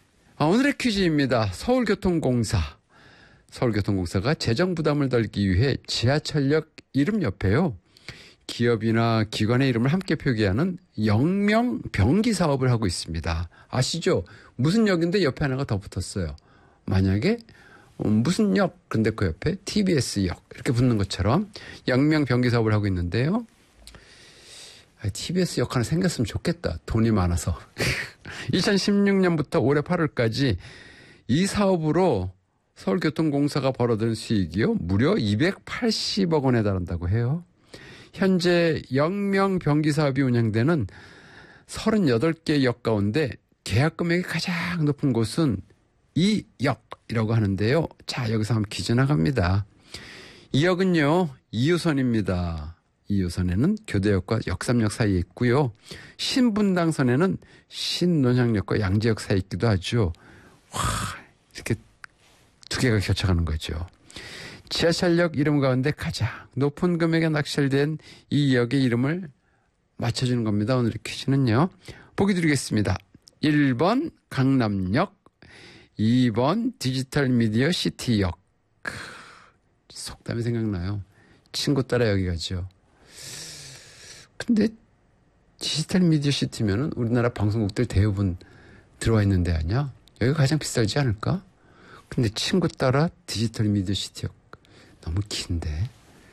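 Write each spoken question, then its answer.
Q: 지하철역 이름 가운데 가장 높은 금액에 낙찰된 이 역의 이름을 맞춰주는 겁니다.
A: 1: 강남역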